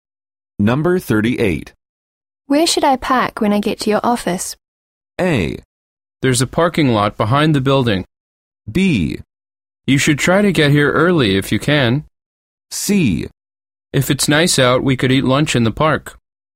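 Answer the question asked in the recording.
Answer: A: There's a parking lot behind the building.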